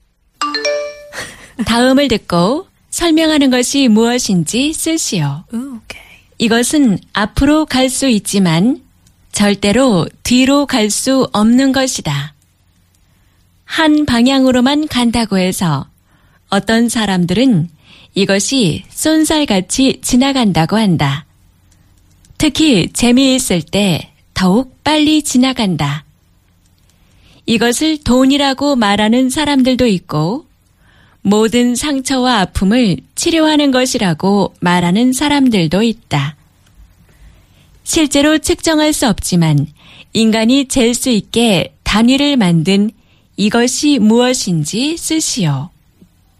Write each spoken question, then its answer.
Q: 실제로 측정할 수 없지만 인간이 잴 수 있게 단위를 만든 이것이 무엇인지 쓰시오.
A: 시간.